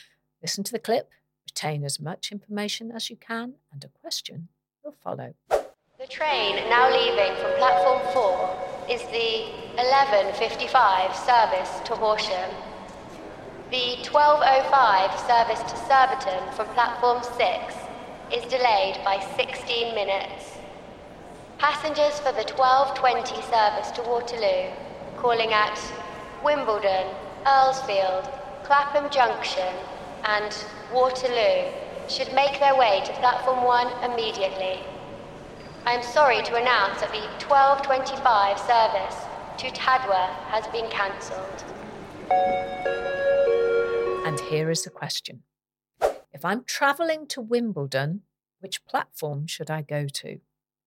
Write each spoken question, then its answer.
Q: If I'm travelling to Wimbledon, which platform should I go to?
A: The answer was platform one.